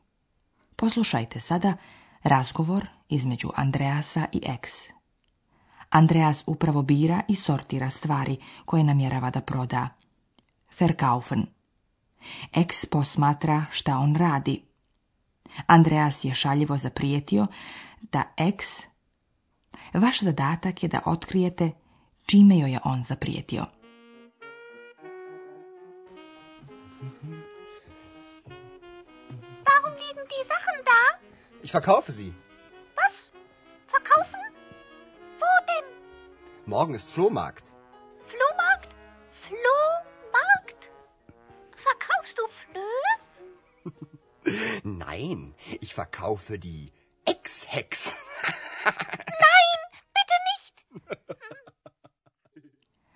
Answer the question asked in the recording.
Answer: Andreas je zaprijetio Ex da će i nju prodati, isto kao i svoje stvari.